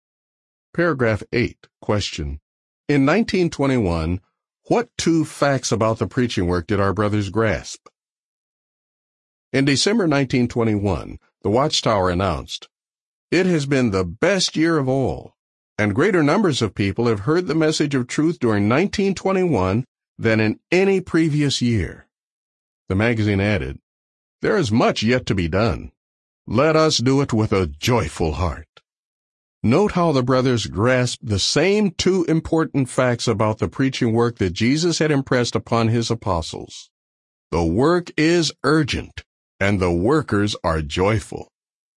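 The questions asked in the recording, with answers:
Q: In 1921, what two facts about the preaching work did our brothers grasp?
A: The work is urgent, and the workers are joyful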